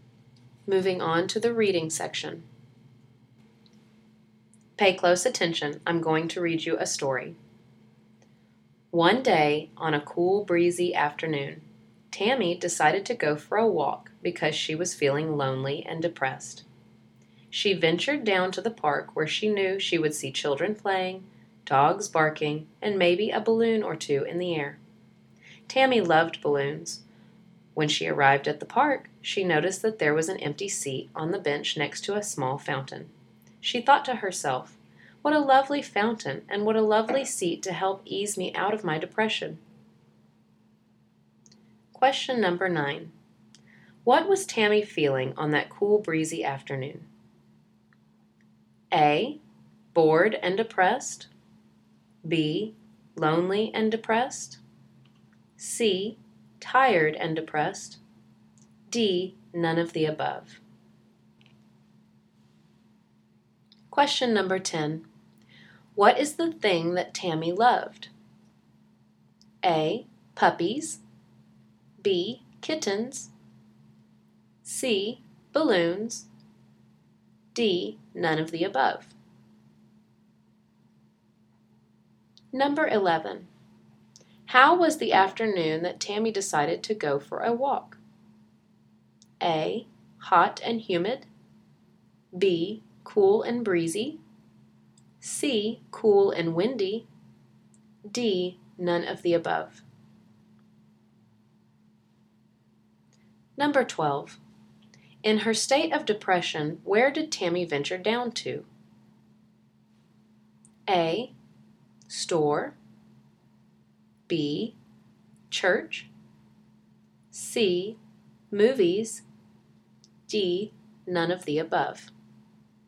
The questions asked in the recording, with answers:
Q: What was Tammy feeling on that cool, breezy afternoon?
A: Number 9, the answer is B.

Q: What is the thing that Tammy loved?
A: For number 10, the answer is C.

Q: How was the afternoon that Tammy decided to go for a walk?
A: For number 11, the answer is B.

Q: In her state of depression, where did Tammy venture down to?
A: And the answer to number 12 is D.